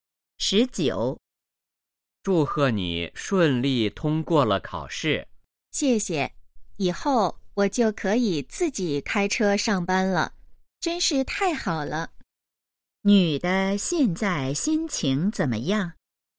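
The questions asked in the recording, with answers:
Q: 女的现在心情怎么样?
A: 很高兴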